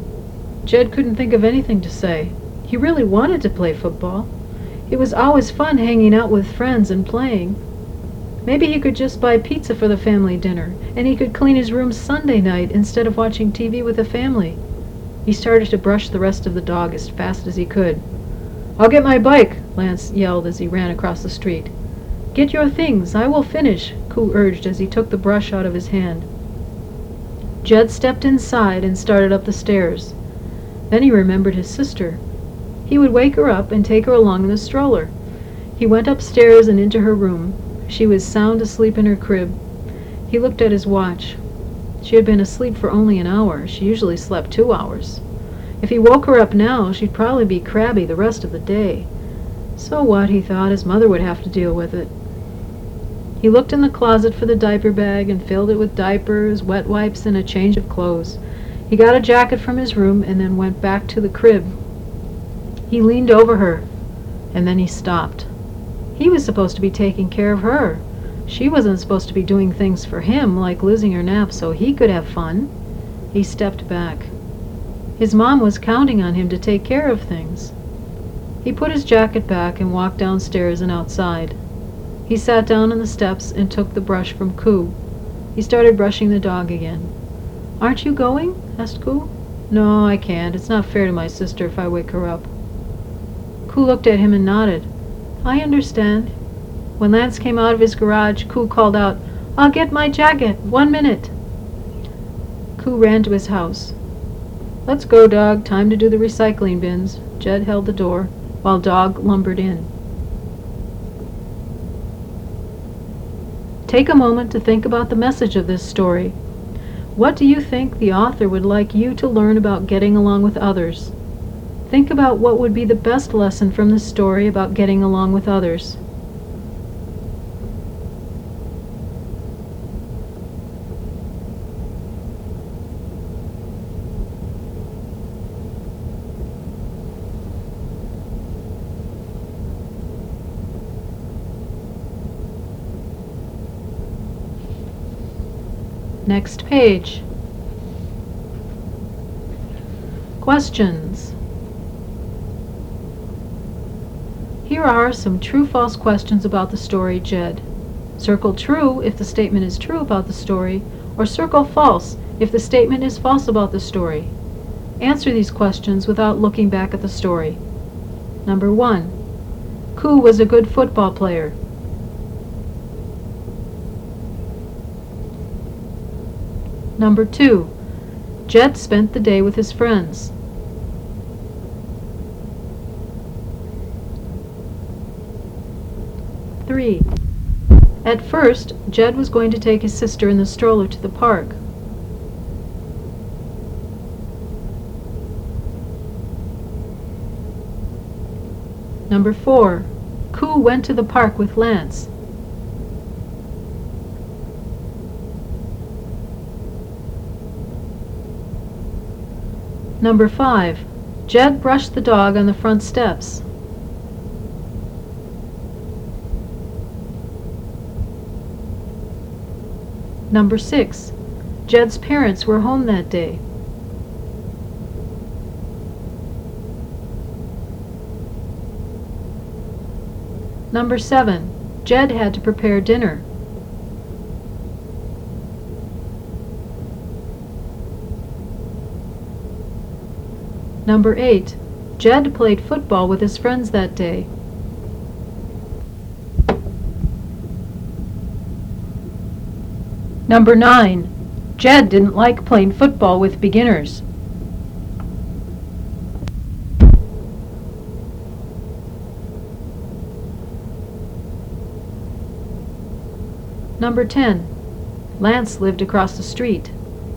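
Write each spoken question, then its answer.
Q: Jed brushed the dog on the front steps.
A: True

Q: Jed played football with his friends that day.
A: False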